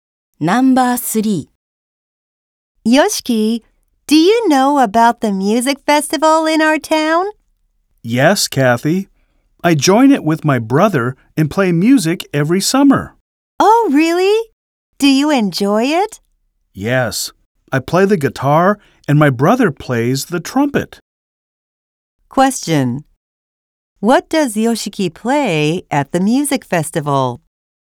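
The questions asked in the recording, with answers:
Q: What does Yoshiki play at the music festival?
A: The guitar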